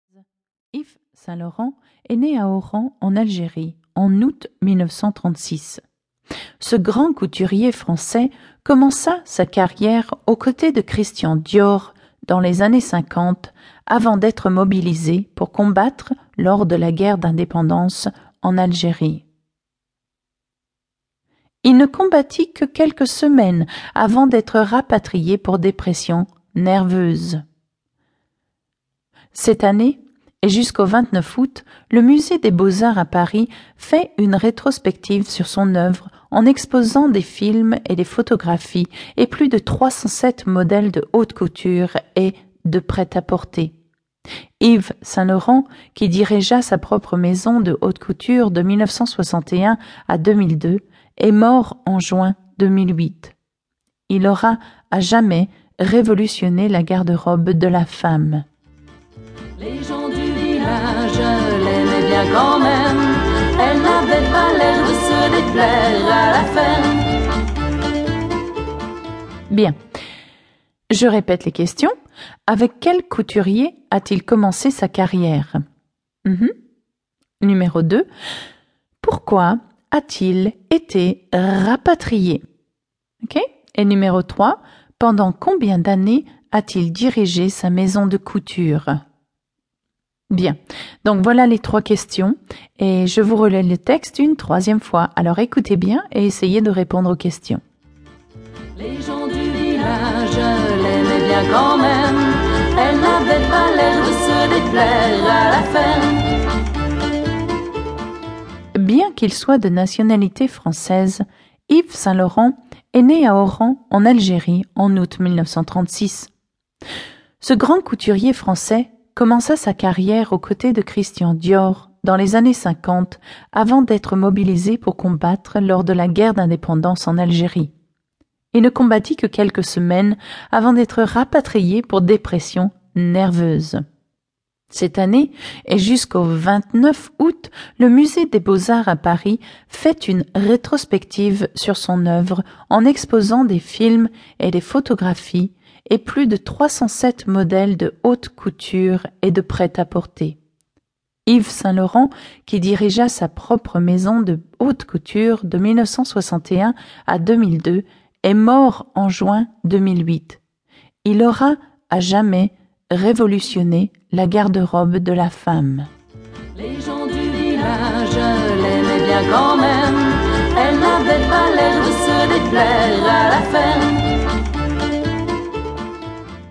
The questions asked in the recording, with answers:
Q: Avec quel couturier a-t-il commencé sa carrière?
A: Oui, Christian Dior. Il a commencé sa carrière avec Christian Dior.

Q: Pourquoi a-t-il été rapatrié?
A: Car il a eu une dépression nerveuse.

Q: Pendant combien d'années a-t-il dirigé sa maison de couture?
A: Il a dirigé sa maison de couture de 1961 à 2002, c'est-à-dire pendant 41 ans.